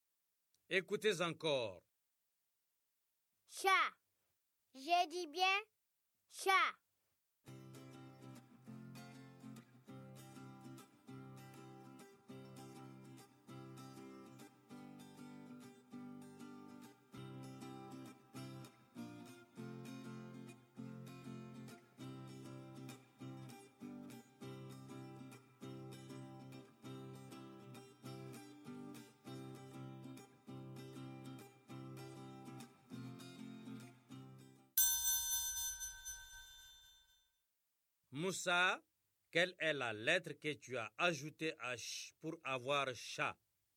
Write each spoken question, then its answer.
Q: Moussa, quelle est la lettre que tu as ajoutée à « ch » pour avoir « chat » ?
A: Monsieur A.